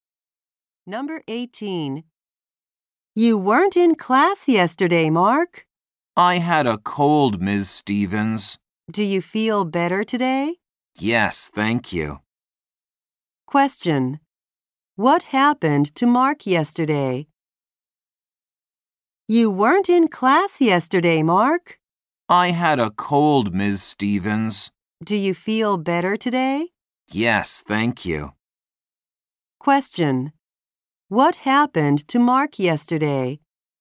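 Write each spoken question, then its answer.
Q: What happened to Mark yesterday?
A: He had a cold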